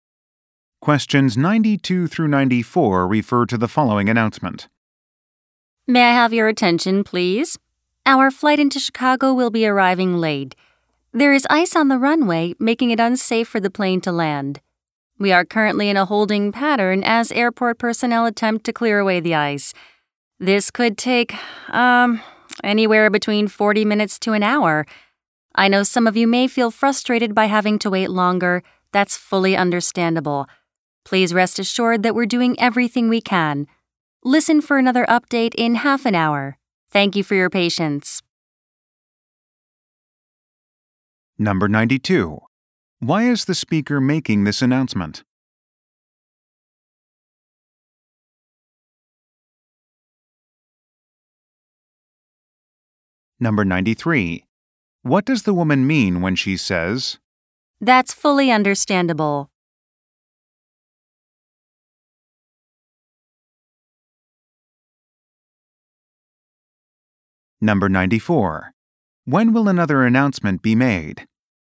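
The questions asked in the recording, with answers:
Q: Why is the speaker making this announcement?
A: To announce a delayed landing due to ice on the runway

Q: What does the woman mean when she says,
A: She understands passengers' frustration

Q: When will another announcement be made?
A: In half an hour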